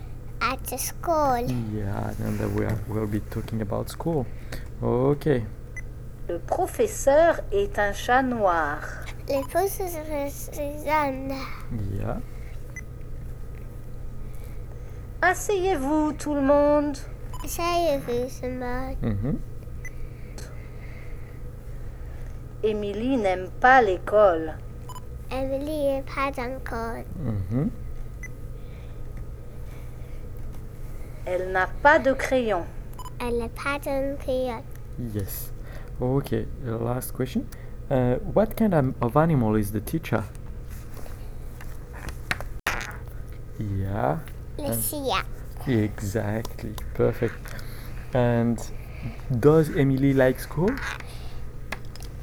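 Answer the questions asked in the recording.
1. A black cat
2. No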